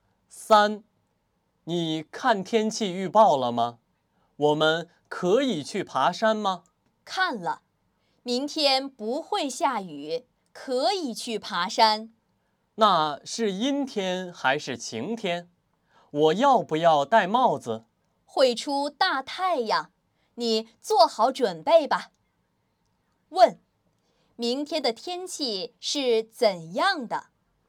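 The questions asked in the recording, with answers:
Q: 明天的天气是怎样的?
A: 晴天,会出大太阳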